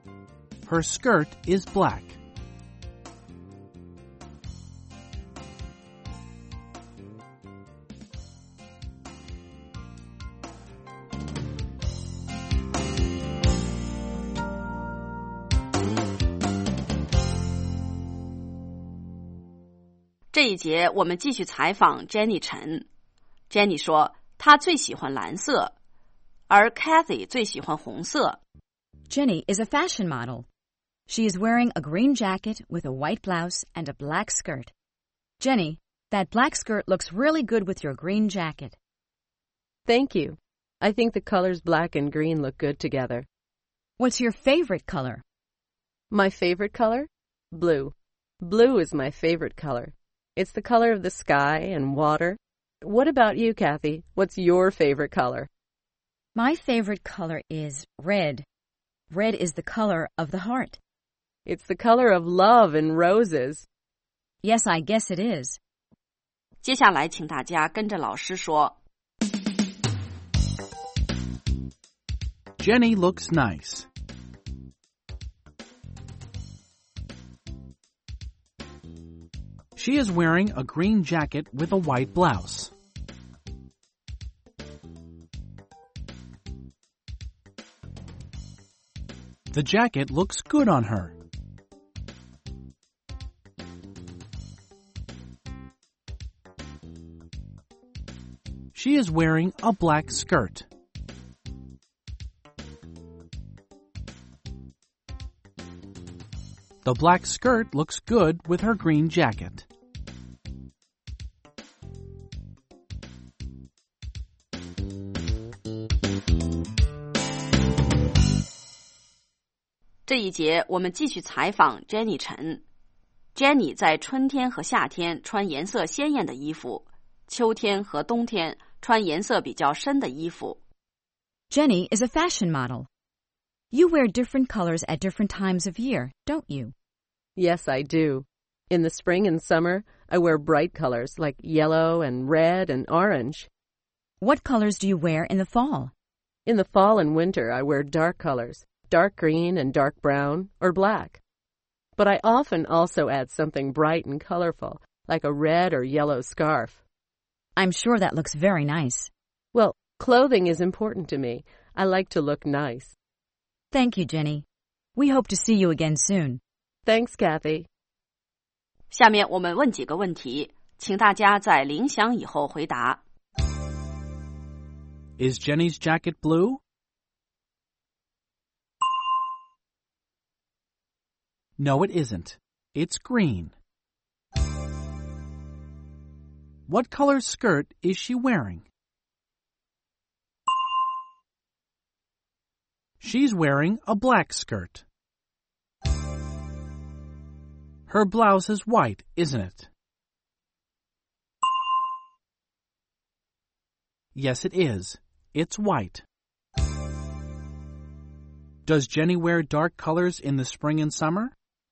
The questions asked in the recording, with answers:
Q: Is Jenny's jacket blue?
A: No, it isn't. It's green.

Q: What color skirt is she wearing?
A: She's wearing a black skirt.

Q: Does Jenny wear dark colors in the spring and summer?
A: No, she doesn't. In the spring and summer, she wears bright colors.